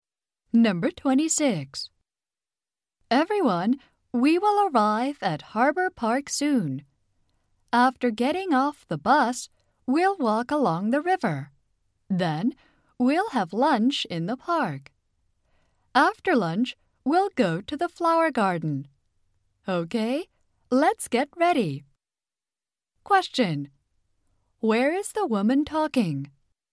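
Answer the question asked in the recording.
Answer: On a bus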